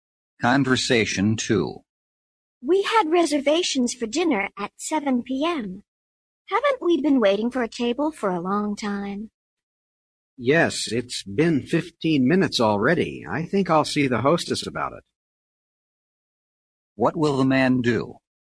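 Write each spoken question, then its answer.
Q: What will the man do?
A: Talk to the hostess about the table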